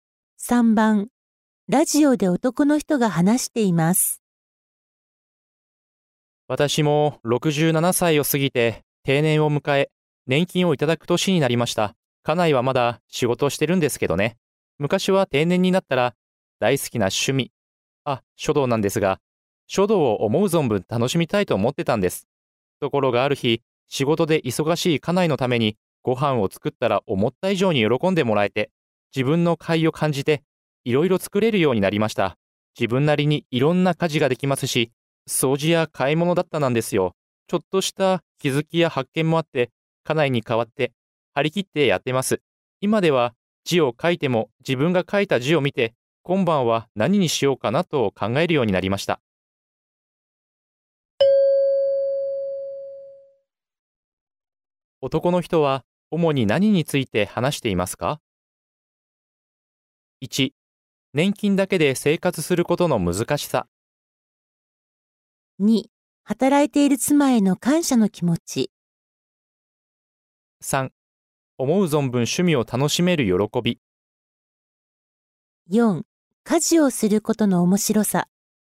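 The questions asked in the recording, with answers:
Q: 男の人は、主に何について話していますか?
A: 4: 家事をすることの面白さ。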